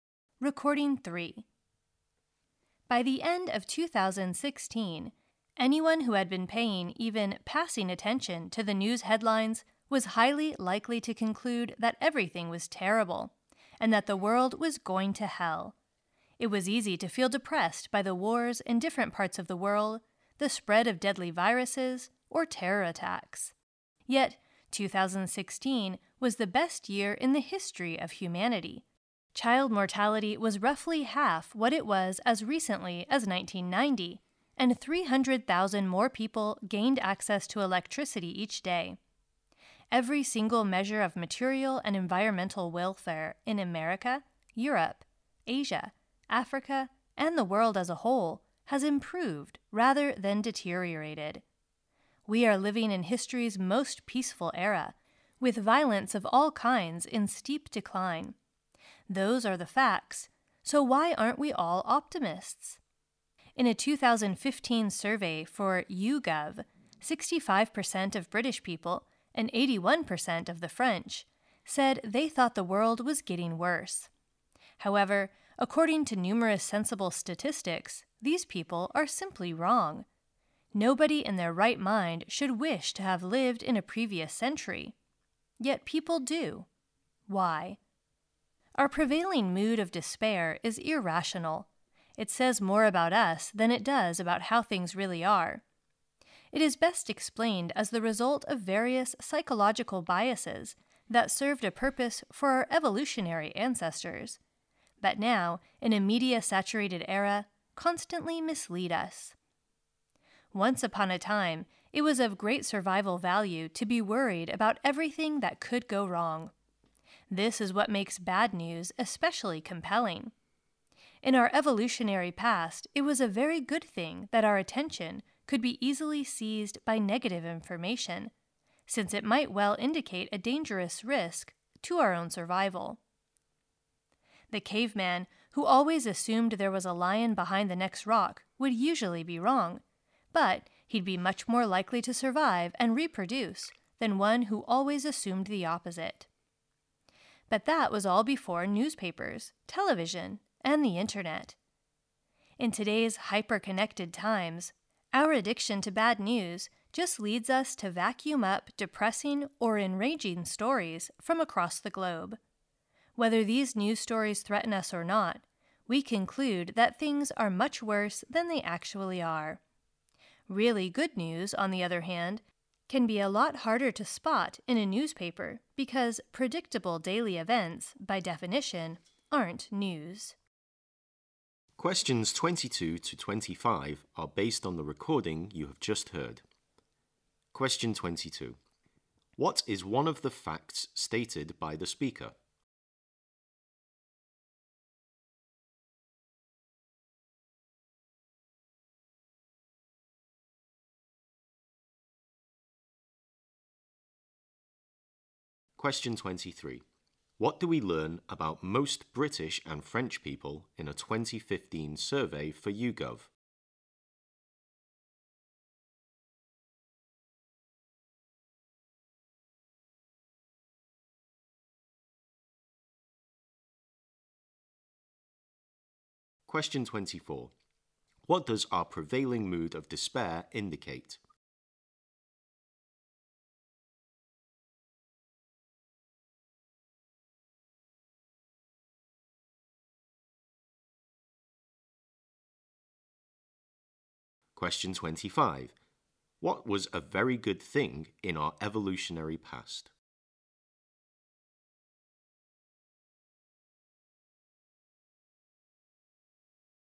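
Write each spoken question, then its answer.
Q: What do we learn about most British and French people in a 2015 survey for YouGov?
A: They thought the world was getting worse

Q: What does our prevailing mood of despair indicate?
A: It says more about us than about how things really are

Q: What was a very good thing in our evolutionary past?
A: That our attention could easily be seized by negative information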